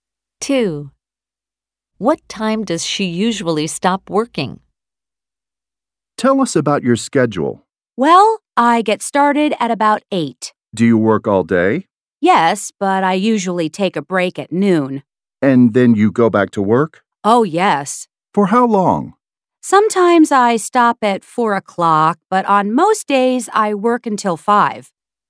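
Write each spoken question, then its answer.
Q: What time does she usually stop working?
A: At 5 o'clock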